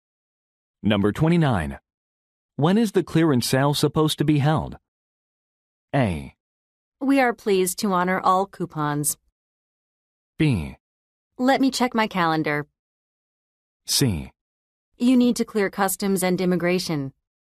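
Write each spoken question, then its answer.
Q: When is the clearance sale supposed to be held?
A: B: Let me check my calendar.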